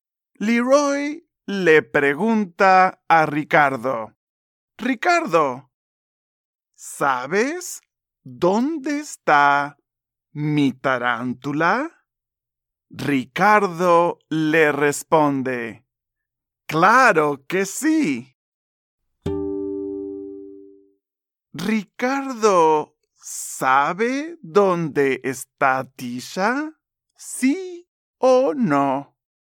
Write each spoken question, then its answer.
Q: Ricardo ¿Sabe dónde está Tisha?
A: Muy bien. Ricardo sabe dónde está Tisha.